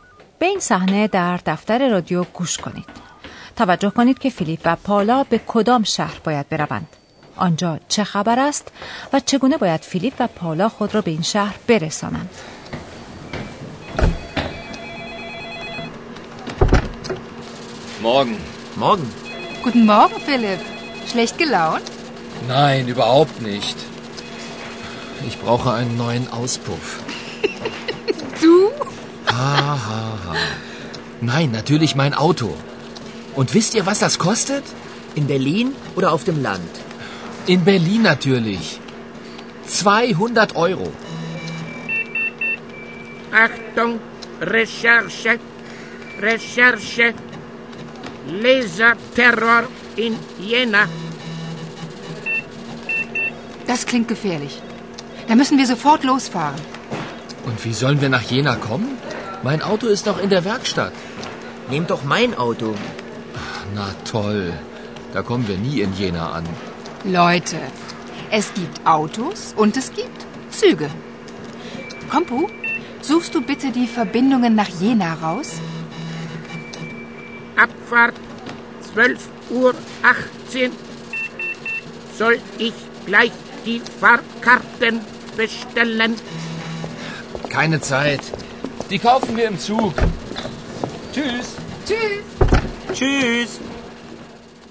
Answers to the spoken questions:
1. فیلیپ و پاولا میبایست به شهر ینا بروند.
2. بلکه موضوع بر سر ترور لیزری در شهر یناست.
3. پاولا به آنها یادآور می شود که امکان استفاده از قطار هم وجود دارد